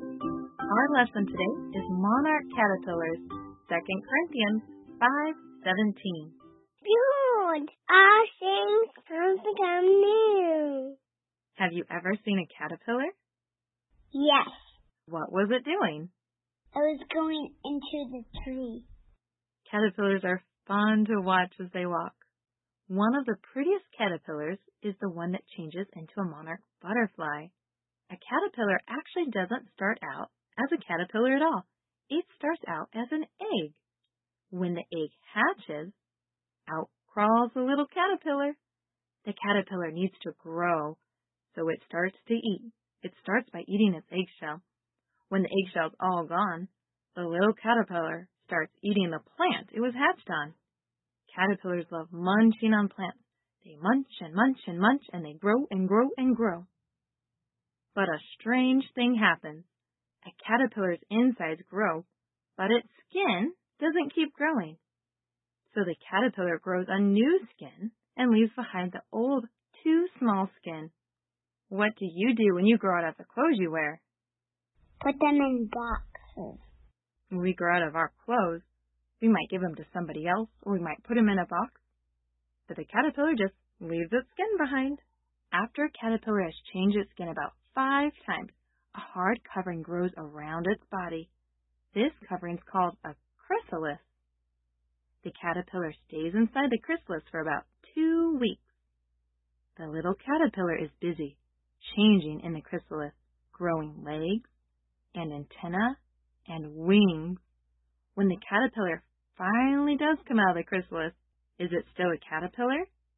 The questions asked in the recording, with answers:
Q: When the caterpillar finally does come out of the chrysalis, is it still a caterpillar?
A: No.